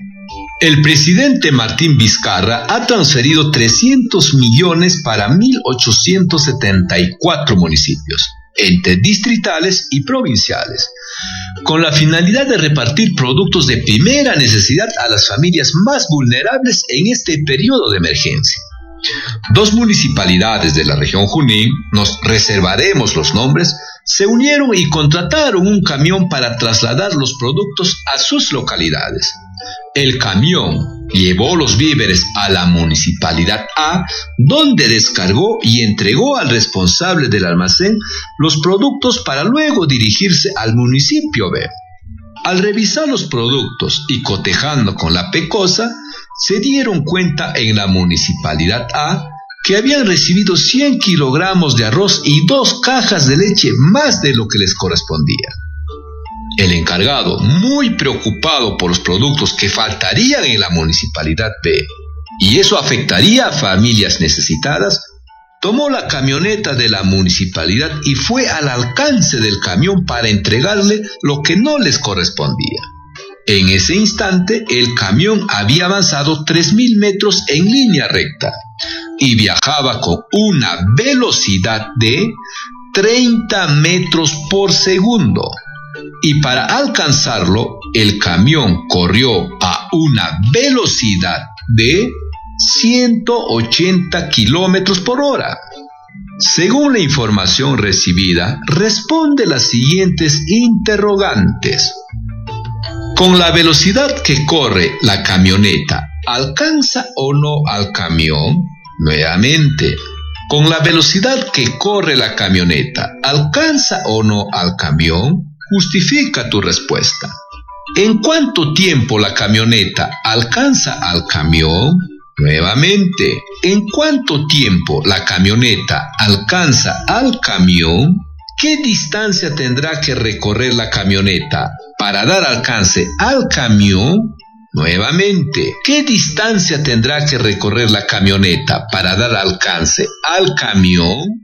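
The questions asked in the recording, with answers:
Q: Con la velocidad que corre la camioneta, ¿alcanza o no al camión?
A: Sí, lo alcanza (50 m/s > 30 m/s)

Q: ¿En cuánto tiempo la camioneta alcanza al camión?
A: 150 segundos

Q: ¿Qué distancia tendrá que recorrer la camioneta para dar alcance al camión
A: 7500 metros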